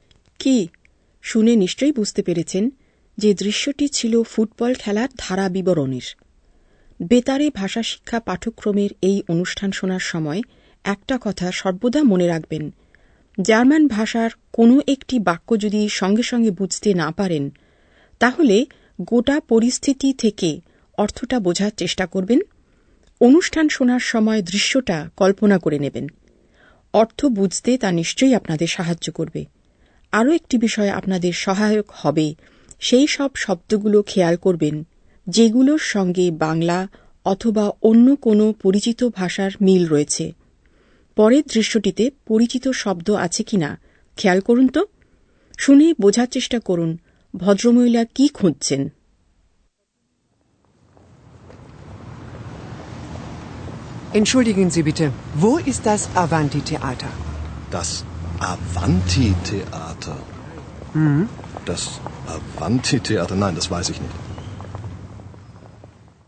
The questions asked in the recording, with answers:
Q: শুনে বোঝার চেষ্টা করুন ভদ্রমহিলা কি খুঁজছেন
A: তিনি খুঁজছেন আভান্তি theatre